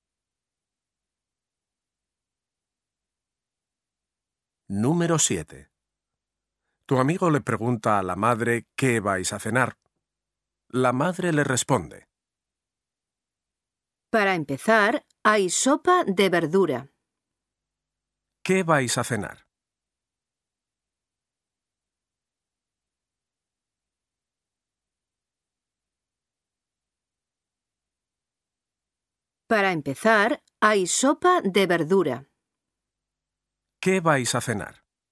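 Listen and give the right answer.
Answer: Sopa de verdura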